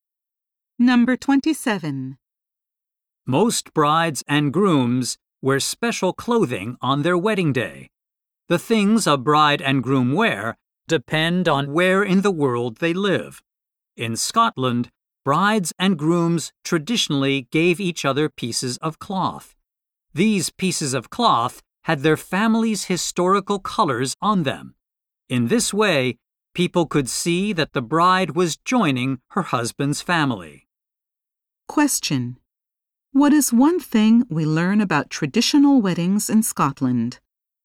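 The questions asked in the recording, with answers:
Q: What is one thing we learn about traditional weddings in Scotland?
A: Brides and grooms gave each other cloth with family colors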